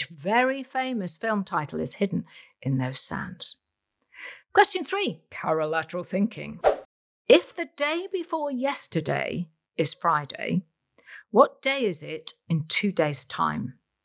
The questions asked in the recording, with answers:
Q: If the day before yesterday is Friday, what day is it in 2 days' time?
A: And the answer is Tuesday.